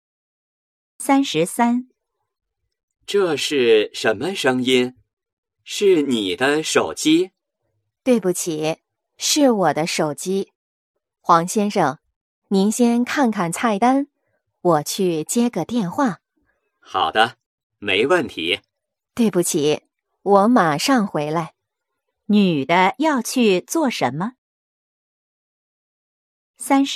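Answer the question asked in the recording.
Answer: 接电话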